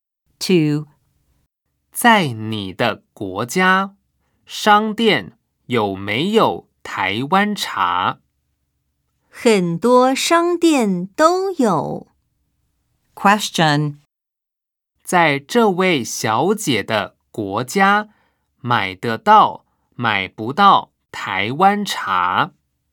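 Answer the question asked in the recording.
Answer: 买得到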